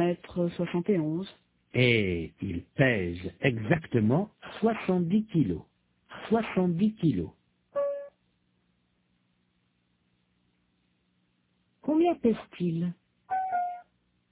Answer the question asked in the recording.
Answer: 70 kilos.